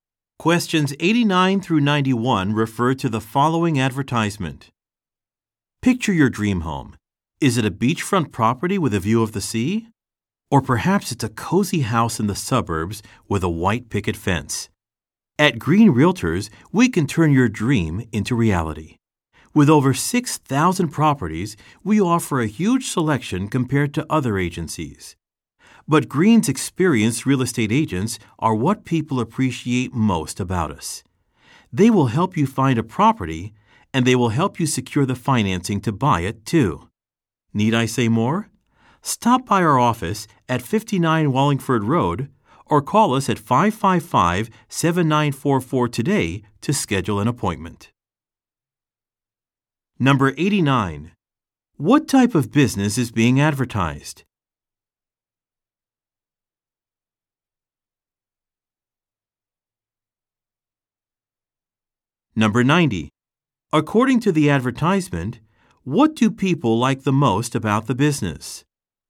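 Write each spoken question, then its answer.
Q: What type of business is being advertised?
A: A real estate agency

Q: According to the advertisement, what do people like the most about the business?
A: Its experienced real estate agents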